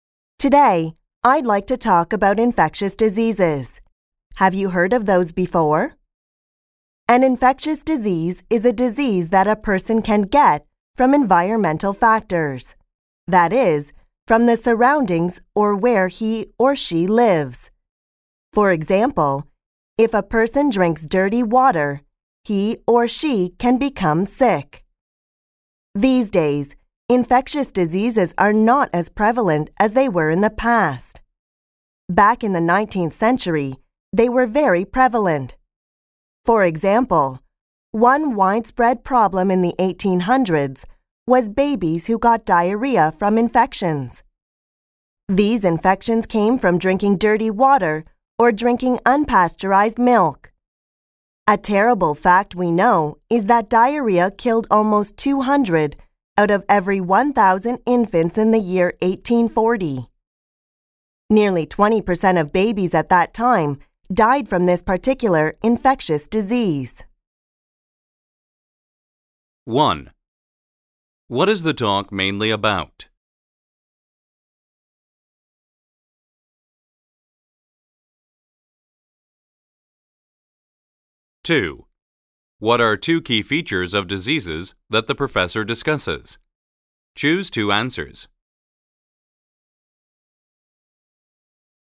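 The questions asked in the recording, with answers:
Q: What is the talk mainly about?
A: Infectious diseases

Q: How does the professor emphasize her point about infections in the 1800s?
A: By giving statistics: diarrhea killed almost 200 of every 1,000 infants in 1840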